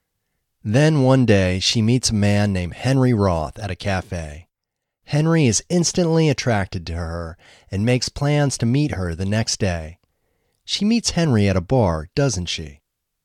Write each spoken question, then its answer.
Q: She meets Henry at a bar, doesn't she?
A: No, she doesn't meet Henry at a bar.